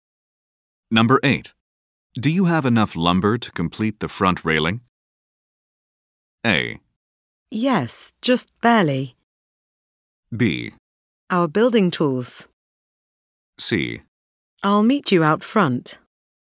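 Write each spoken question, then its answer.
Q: Do you have enough lumber to complete the front railing?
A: A: Yes, just barely.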